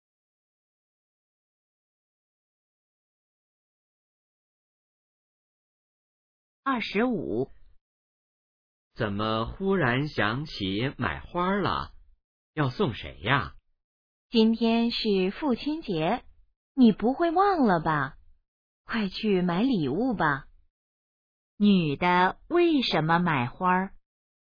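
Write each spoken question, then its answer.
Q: 女的为什么买花?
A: 今天是父亲节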